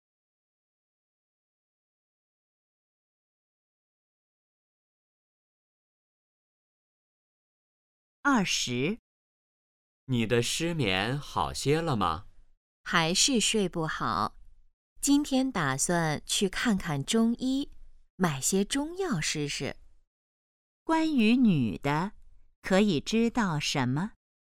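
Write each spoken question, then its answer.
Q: 关于女的,可以知道什么?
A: 她失眠,打算去看中医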